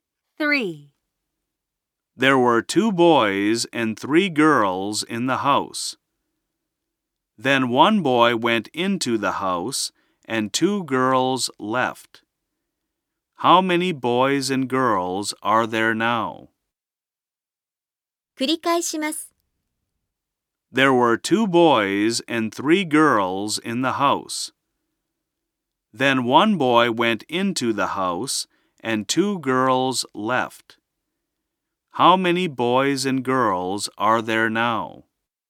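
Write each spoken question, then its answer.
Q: How many boys and girls are there now?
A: Three boys and one girl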